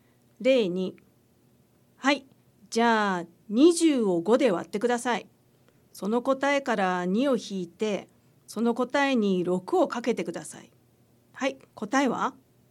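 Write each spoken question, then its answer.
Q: はい、答えは?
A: 12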